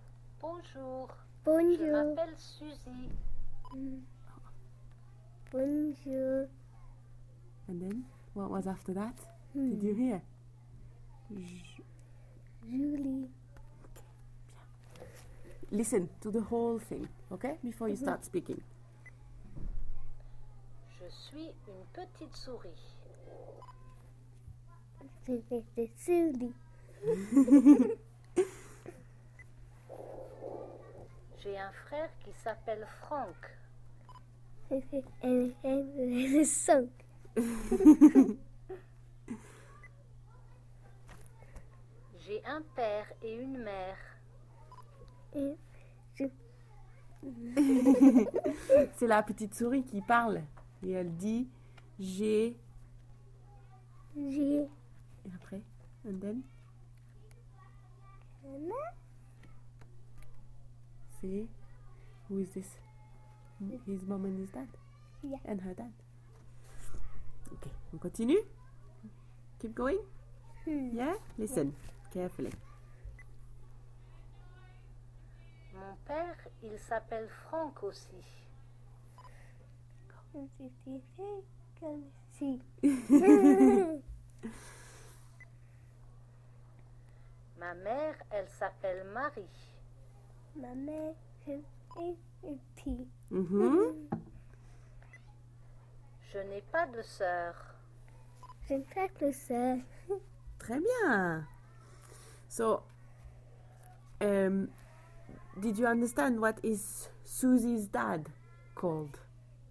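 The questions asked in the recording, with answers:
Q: did you understand what is Susie's dad called?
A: Franck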